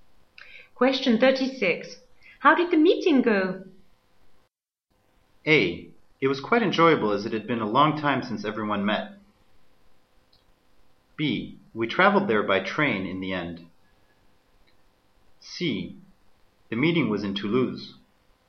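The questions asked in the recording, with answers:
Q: How did the meeting go?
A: A: It was quite enjoyable as it had been a long time since everyone met.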